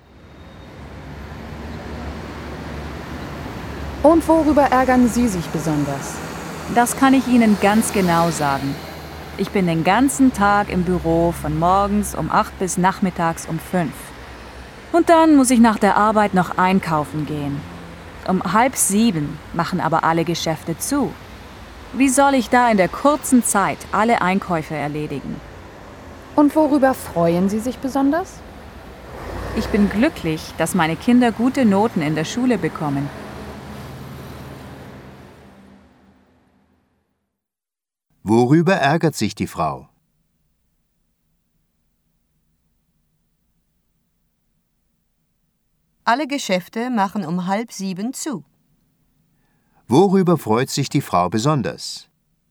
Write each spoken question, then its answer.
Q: Worüber freut sich die Frau besonders?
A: Ihre Kinder bekommen gute Noten in der Schule.